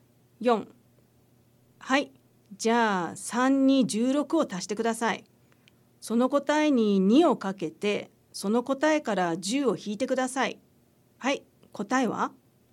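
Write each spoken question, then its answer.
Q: はい、答えは?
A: 28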